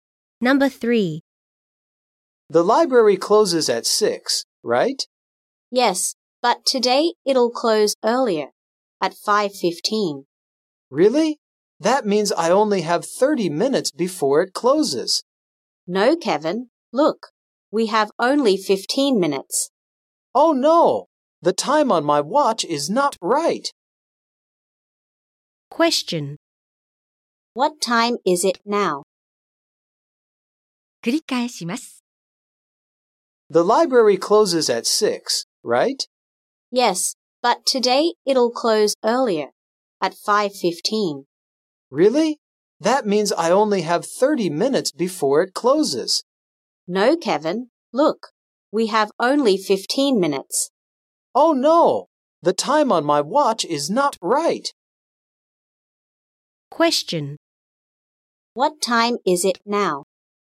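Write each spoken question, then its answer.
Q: What time is it now?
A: 5:00.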